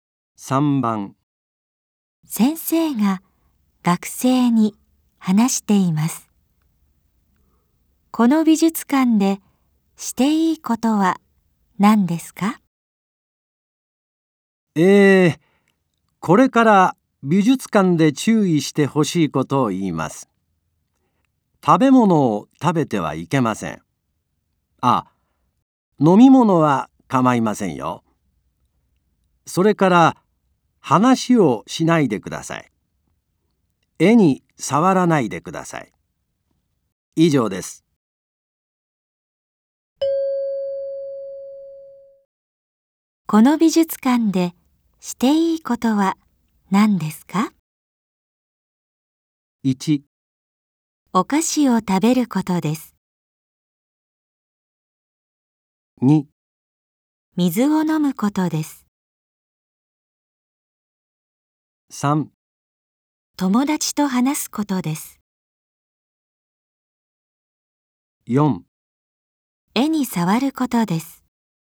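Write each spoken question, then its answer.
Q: この美術館でしていいことは何ですか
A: 2: 水を飲むことです。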